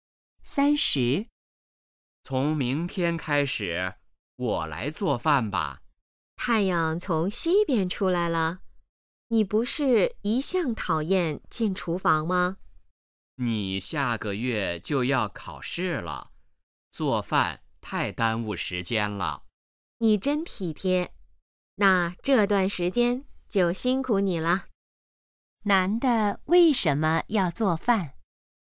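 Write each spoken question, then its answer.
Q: 男的为什么要做饭?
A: 女的下个月要考试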